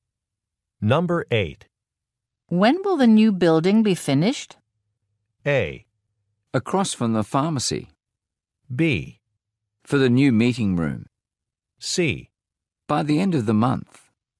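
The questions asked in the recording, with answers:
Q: When will the new building be finished?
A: C: By the end of the month.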